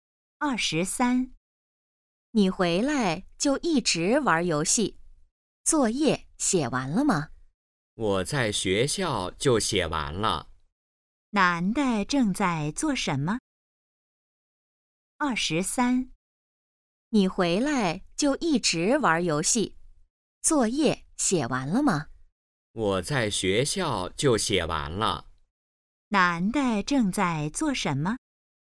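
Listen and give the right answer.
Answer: 玩游戏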